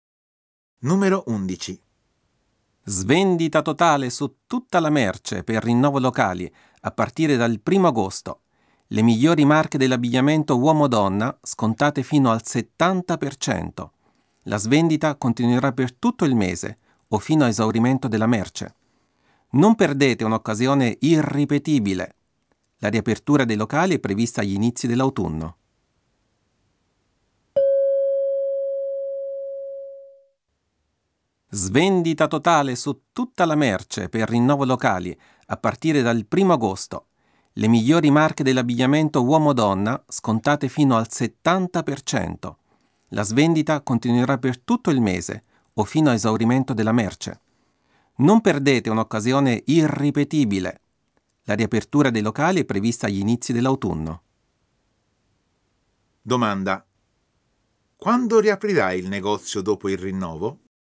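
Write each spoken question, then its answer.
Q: Quando riaprirai il negozio dopo il rinnovo?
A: Agli inizi dell'autunno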